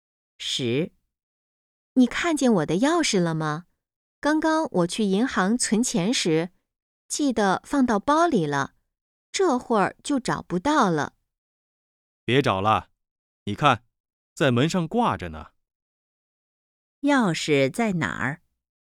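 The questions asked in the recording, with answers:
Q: 钥匙在哪儿?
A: 在门上挂着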